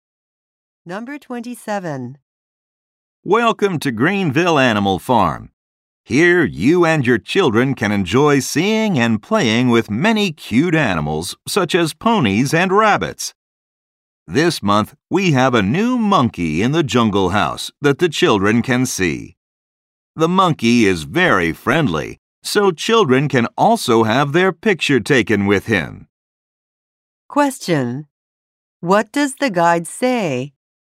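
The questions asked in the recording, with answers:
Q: What does the guide say?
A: Children can have their picture taken with a new monkey.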